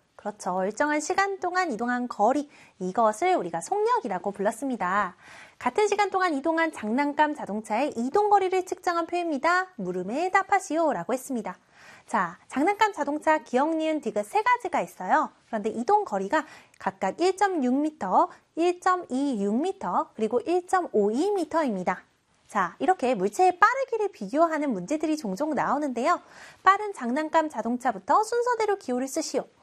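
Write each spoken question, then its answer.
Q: 빠른 장난감 자동차부터 순서대로 기호를 쓰시오.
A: 기역, 디귿, 니은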